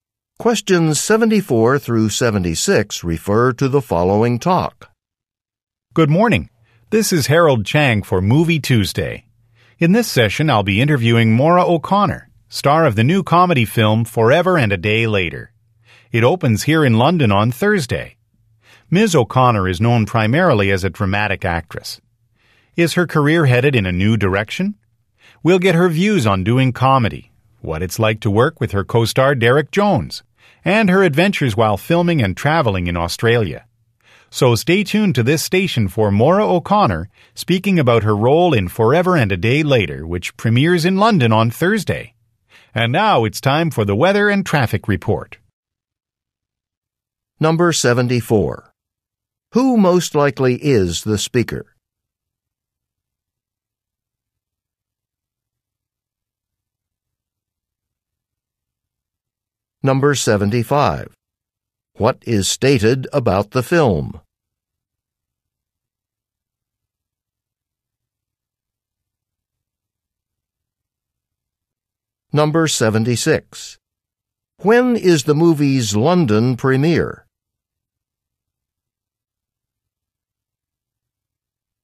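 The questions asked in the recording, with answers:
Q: Who most likely is the speaker?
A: A radio host

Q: What is stated about the film?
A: It is a comedy

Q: When is the movie's London premiere?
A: Thursday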